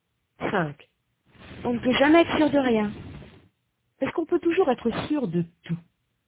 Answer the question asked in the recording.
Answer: Non. On ne peut jamais être sûr de rien.